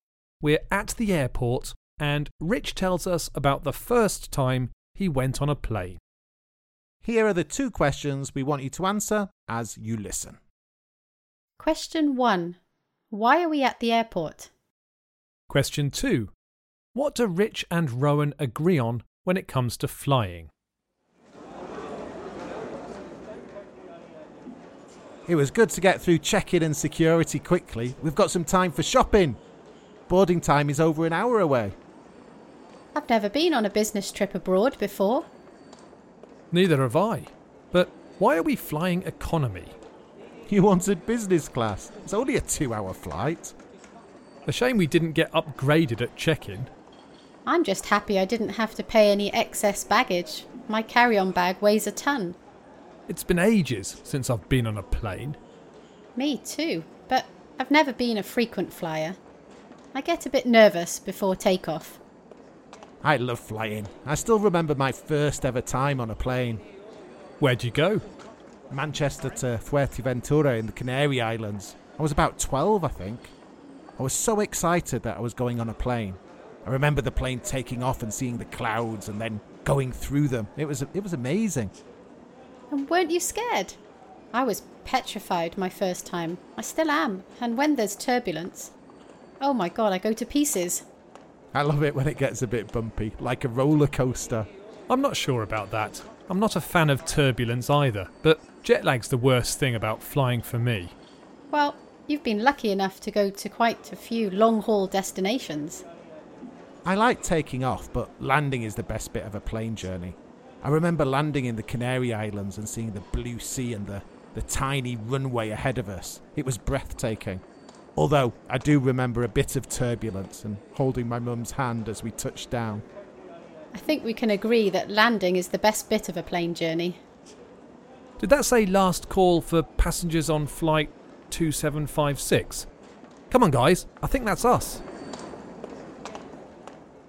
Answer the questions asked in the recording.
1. We were at the airport because we were going on a business trip together.
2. We agreed that the plane landing was the best bit of the journey.